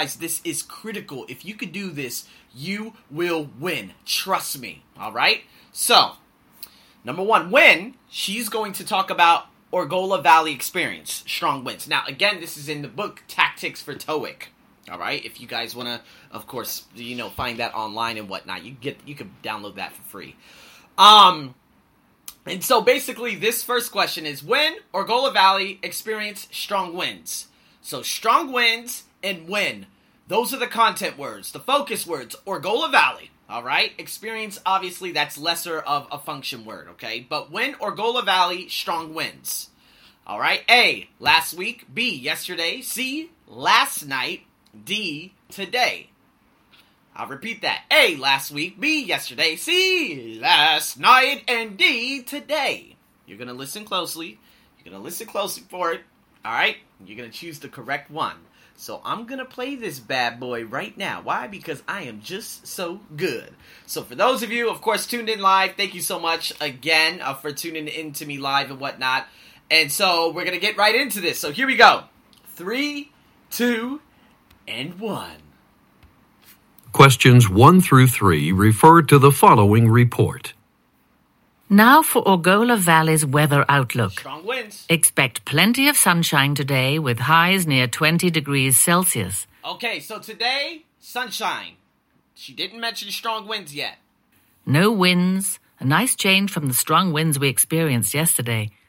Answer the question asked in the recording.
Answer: B, yesterday. That's your answer, okay?